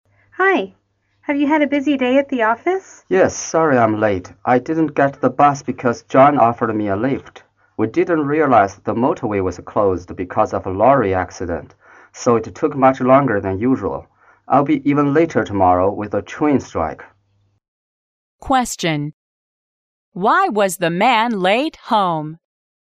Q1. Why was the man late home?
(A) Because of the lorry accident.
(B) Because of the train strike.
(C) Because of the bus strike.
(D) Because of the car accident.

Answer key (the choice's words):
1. Because of the lorry accident.

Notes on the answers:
根据because of a lorry accident可知男士晚回家的原因是碰上卡车事故。

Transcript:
W: Hi! Have you had a busy day at the office?
M: Yes, sorry I'm late. I didn't get the bus because John offered me a lift. We didn't realize the motorway was closed because of a lorry accident, so it took much longer than usual. I'll be even later tomorrow with the train strike.